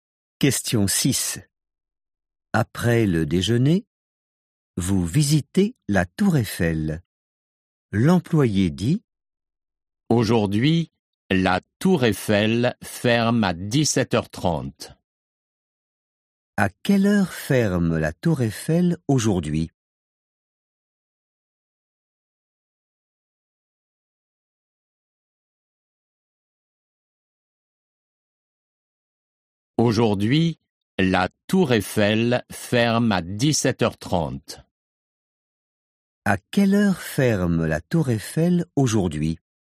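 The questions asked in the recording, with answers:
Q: À quelle heure ferme la Tour Eiffel aujourd'hui?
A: À 17h30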